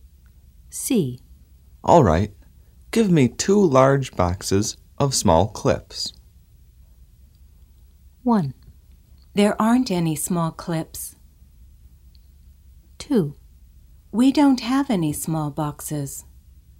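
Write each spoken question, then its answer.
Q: All right. Give me 2 large boxes of small clips.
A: 2: We don't have any small boxes.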